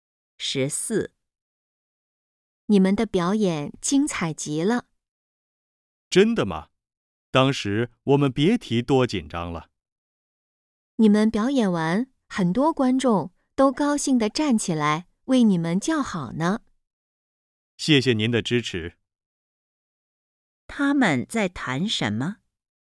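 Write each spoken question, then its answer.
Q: 他们在谈什么?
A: 表演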